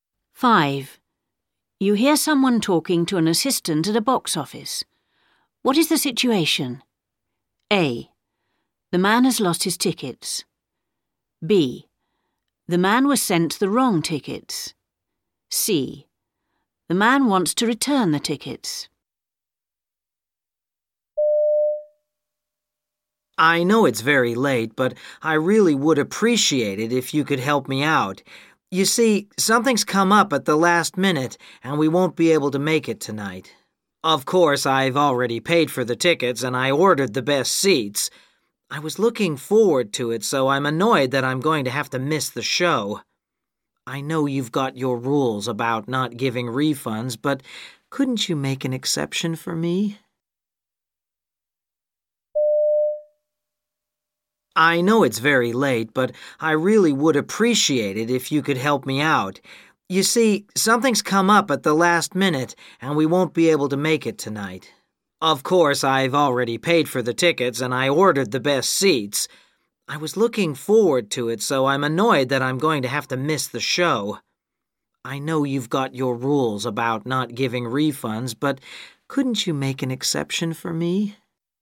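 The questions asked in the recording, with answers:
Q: What is the situation?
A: C: The man wants to return the tickets.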